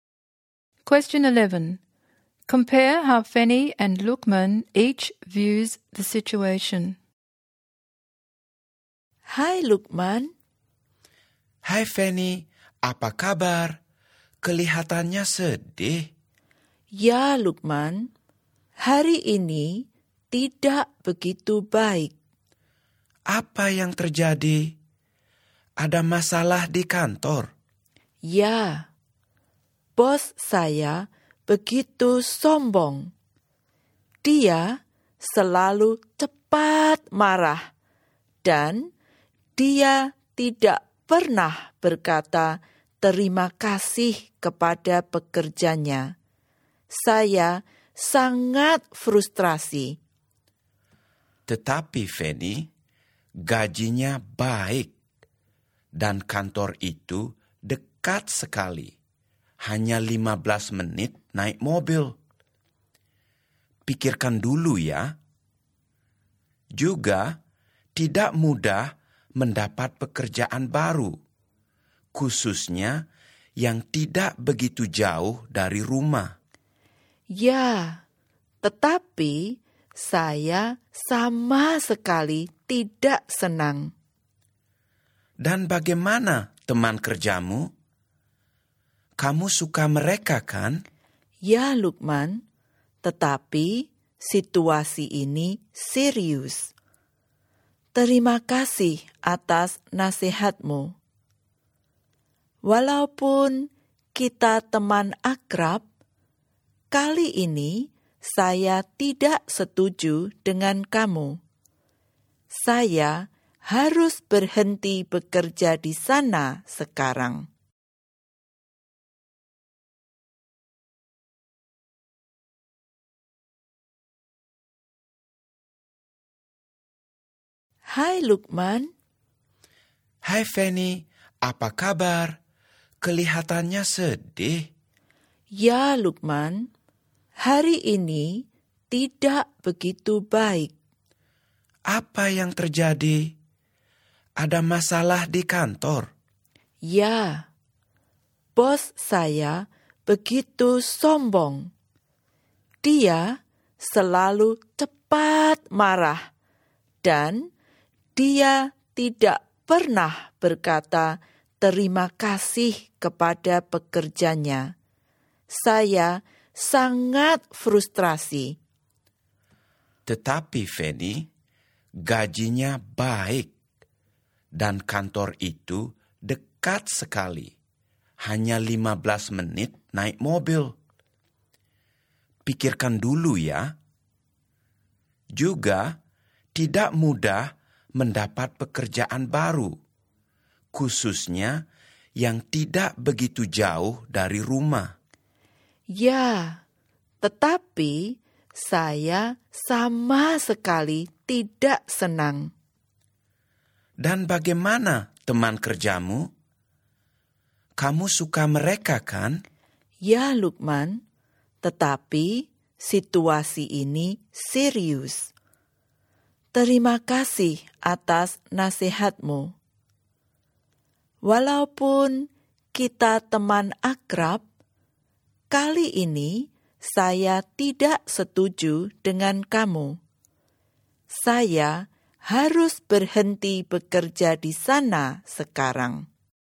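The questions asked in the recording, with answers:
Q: Compare how Fanny and Lukman each views the situation.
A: Fanny is frustrated by her arrogant boss and wants to quit now; Lukman thinks she should stay because the pay is good, the office is close, she likes her co-workers and new jobs are hard to find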